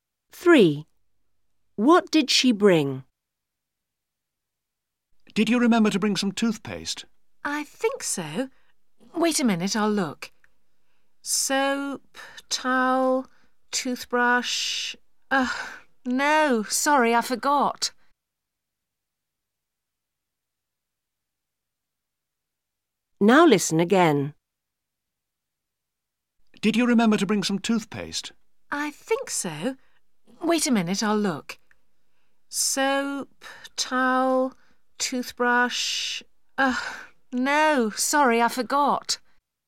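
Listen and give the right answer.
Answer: Soap, towel and toothbrush (no toothpaste)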